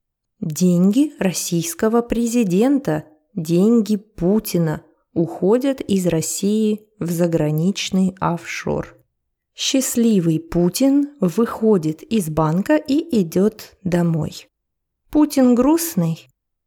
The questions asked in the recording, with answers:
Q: Путин грустный?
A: Конечно, нет. Он счастливый, он рад, он счастлив.